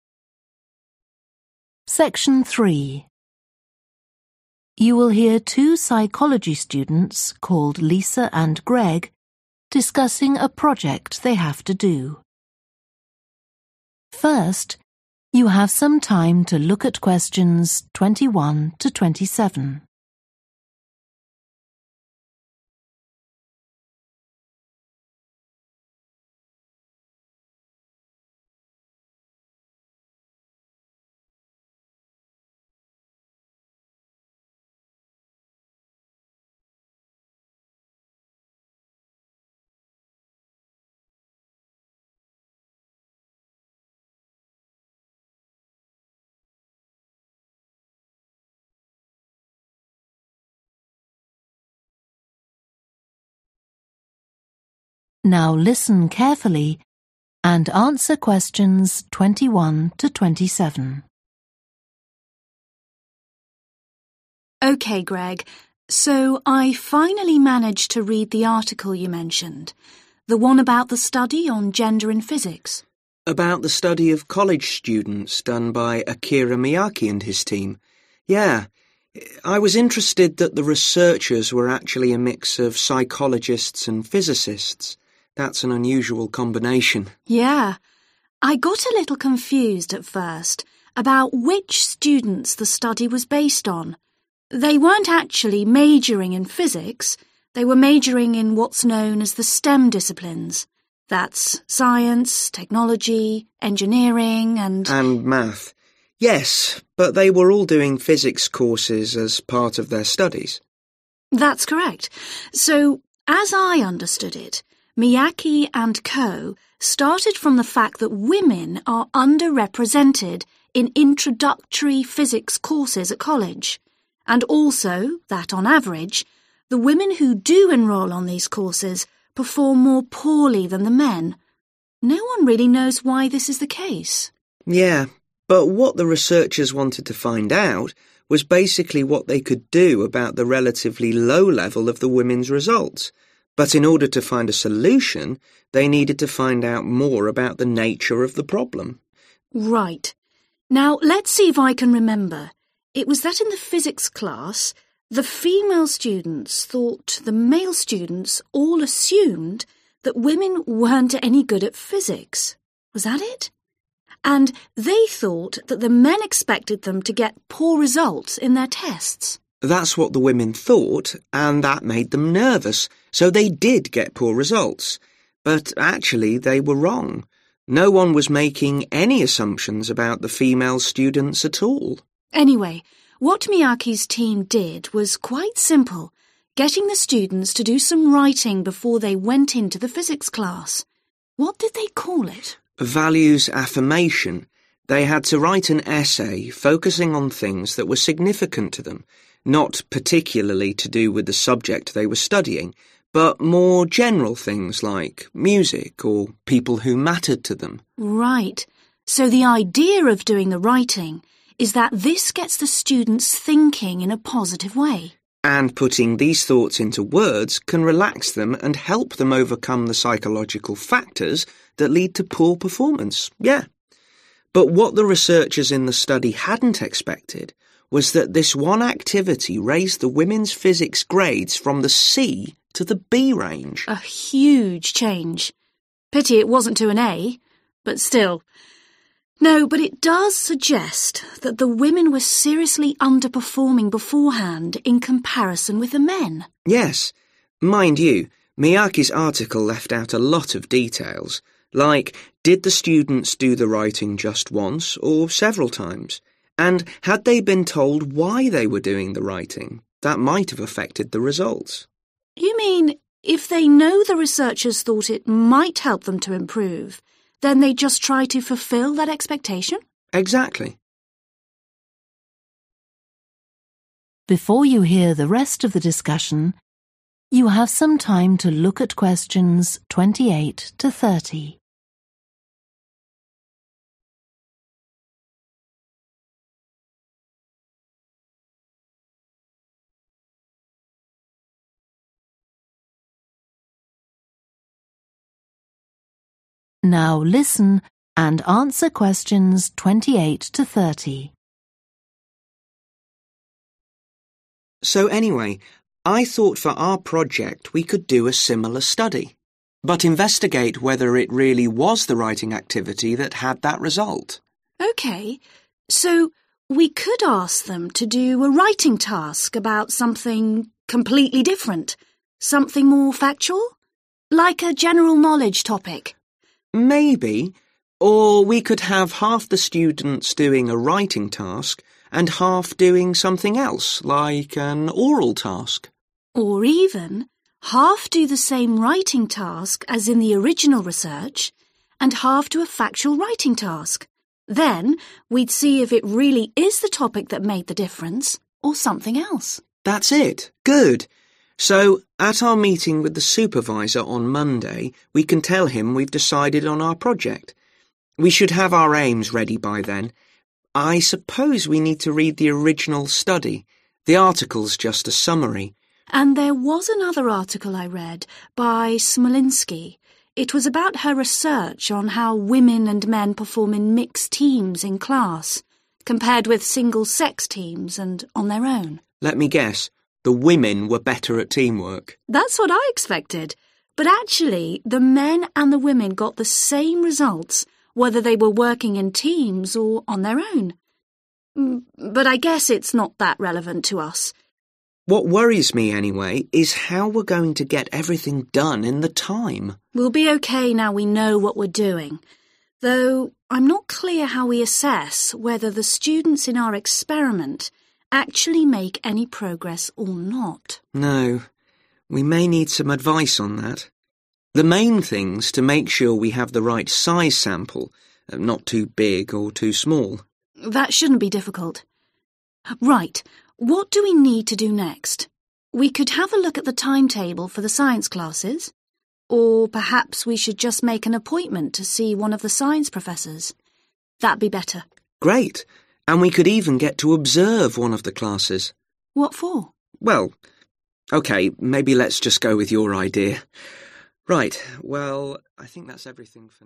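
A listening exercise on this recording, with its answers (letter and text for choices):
Choose the correct letter, A, B or C.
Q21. The students in Akira Miyake's study were all majoring in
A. physics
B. psychology or physics.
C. science, technology, engineering or mathematics.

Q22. The aim of Miyake's study was to investigate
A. what kind of women choose to study physics.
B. a way of improving women's performance in physics.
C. whether fewer women than men study physics at college.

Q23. The female physics students were wrong to believe that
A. the teachers marked them in an unfair way.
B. the male students expected them to do badly.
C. their test results were lower than the male students'.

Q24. Miyake's team asked the students to write about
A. what they enjoyed about studying physics.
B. the successful experiences of other people.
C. something that was important to them personally.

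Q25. What was the aim of the writing exercise done by the subjects?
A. to reduce stress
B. to strengthen verbal ability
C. to encourage logical thinking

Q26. What surprised the researchers about the study?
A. how few students managed to get A grades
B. the positive impact it had on physics results for women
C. the difference between male and female performance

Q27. Greg and Lisa think Miyake's results could have been affected by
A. the length of the writing task.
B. the number of students who took part.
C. the information the students were given.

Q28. Greg and Lisa decide that in their own project, they will compare the effects of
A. two different writing tasks.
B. a writing task with an oral task.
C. two different oral tasks.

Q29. The main finding of Smolinsky's research was that class teamwork activities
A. were most effective when done by all-women groups.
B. had no effect on the performance of men or women.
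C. improved the results of men more than of women.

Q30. What will Lisa and Greg do next?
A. talk to a professor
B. observe a science class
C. look at the science timetable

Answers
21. C. science, technology, engineering or mathematics.
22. B. a way of improving women's performance in physics.
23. B. the male students expected them to do badly.
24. C. something that was important to them personally.
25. A. to reduce stress
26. B. the positive impact it had on physics results for women
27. C. the information the students were given.
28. A. two different writing tasks.
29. B. had no effect on the performance of men or women.
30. A. talk to a professor

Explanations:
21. They weren't actually majoring in physics – they were majoring in what's known as the STEM disciplines. That's science, technology, engineering and ... (họ đang học chuyên ngành được gọi là các ngành STEM. Đó là khoa học, công nghệ, kỹ thuật và...)
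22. But what the researchers wanted to find out was basically what they could do about the relatively low level of the women's results. (Nhưng những gì các nhà nghiên cứu muốn tìm hiểu về cơ bản là những gì họ có thể làm với kết quả học tập tương đối thấp của các nữ sinh.) But in order to find a solution they needed to find out more about the nature of the problem.
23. LISA: Right – now let's see if I can remember ... it was that in the physics class, the female students thought the male students all assumed that women weren't any good at physics ... was that it? And they thought that the men expected them to get poor results in their tests. (nữ sinh nghĩ tất cả nam sinh đều cho rằng họ không giỏi vật lý chút nào cả... có đúng như vậy không? Và họ nghĩ nam sinh luôn mong đợi việc họ đạt được kết quả kém trong các bài kiểm tra) GREG: That's what the women thought, and that made them nervous, so they did get poor results. 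But actually they were wrong ... No one was making any assumption about the female students at all. (Nhưng thực ra họ đã nhầm... Không ai đưa ra bất kỳ giả định nào về các nữ sinh cả.)
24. Values-affirmation – they had to write an essay focusing on things that were significant to them, not particularly to do with the subject they were studying, but more general things like music or people who mattered to them. (họ phải viết một bài luận tập trung vào những điều quan trọng đối với họ, không phải liên quan đến chủ đề họ đang học, mà là những thứ chung chung hơn như âm nhạc hoặc những người quan trọng đối với họ.)
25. And putting these thoughts into words can relax them and help them overcome the psychological factors that lead to poor performance. (đưa những suy nghĩ này thành lời có thể giúp họ thư giãn và vượt qua các yếu tố tâm lý dẫn đến kết quả kém.)
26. But what the researchers in the study hadn't expected was that this one activity raised the women's physics grades from the C to the B range. 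(Nhưng điều mà các nhà nghiên cứu không ngờ tới là hoạt động này đã giúp nâng điểm vật lý của nữ sinh từ mức C lên mức B.)
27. Mind you, Miyake's article left out a lot of details. Like, did the students to the writing just once, or several times? And had they been told why they were doing the writing? That might have affected the results. (Và họ đã được cho biết lý do tại sao họ phải viết hay chưa? Điều đó có thể đã làm thay đổi kết quả)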